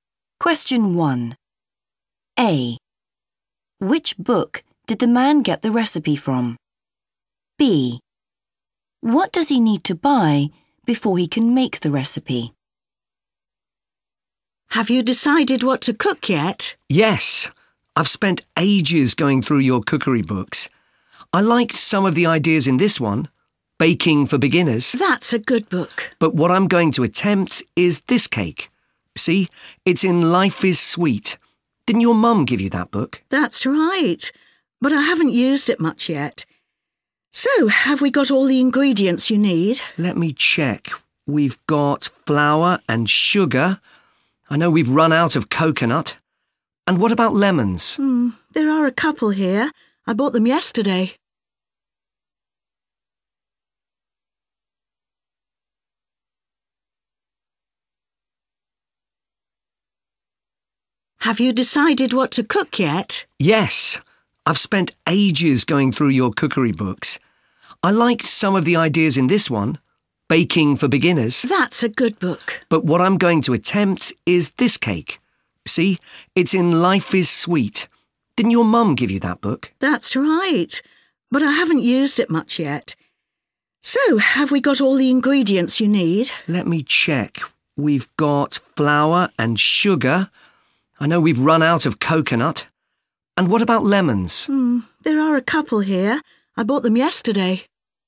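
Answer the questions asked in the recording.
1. Life is Sweet
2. coconut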